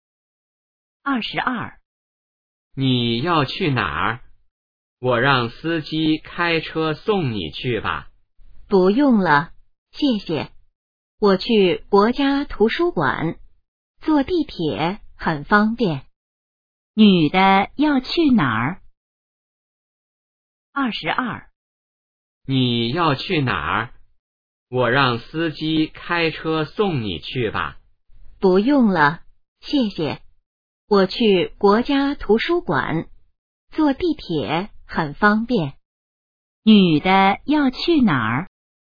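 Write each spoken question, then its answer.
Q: 女的要去哪儿?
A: 国家图书馆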